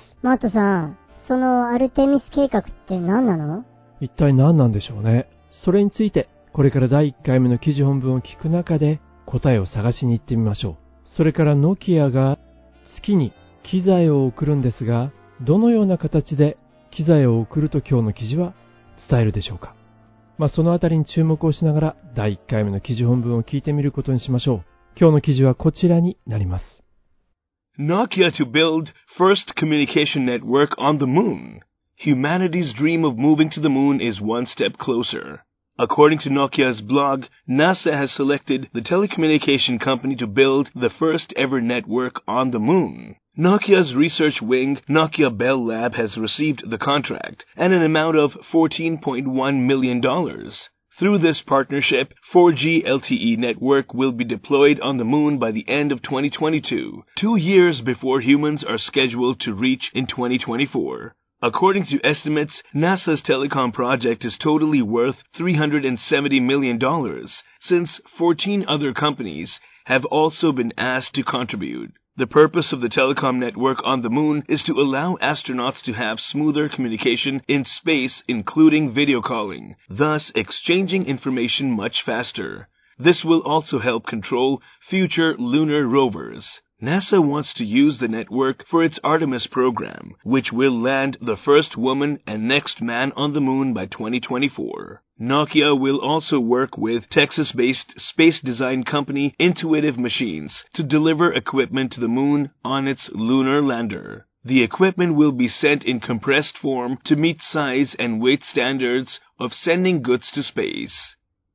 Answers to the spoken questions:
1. 最初の女性と、そして次の男性を月に2024年までに着陸させるという計画ですね。
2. サイズやウェイトのスタンダード、基準を満たすために機器を圧縮して送るみたいですね。